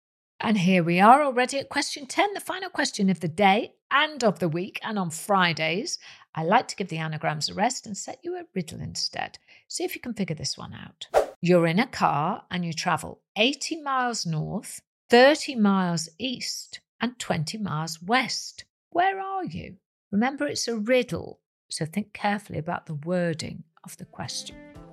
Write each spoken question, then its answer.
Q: Where are you?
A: You're in a car.